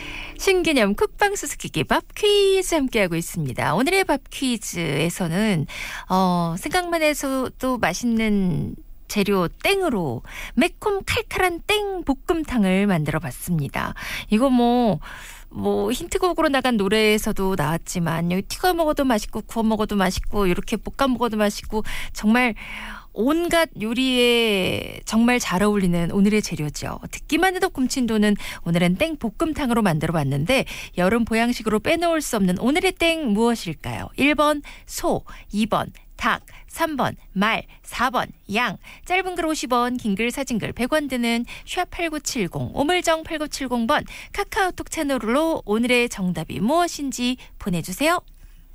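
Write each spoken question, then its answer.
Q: 여름 보양식으로 빼놓을 수 없는 오늘의 땡 무엇일까요?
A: 2: 닭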